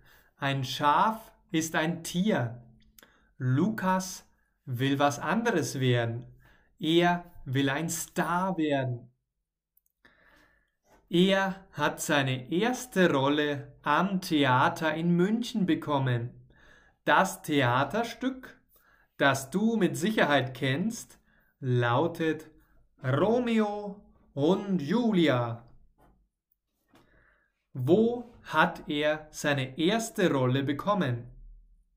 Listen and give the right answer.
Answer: Am Theater in München. Er hat seine erste Rolle am Theater in München bekommen.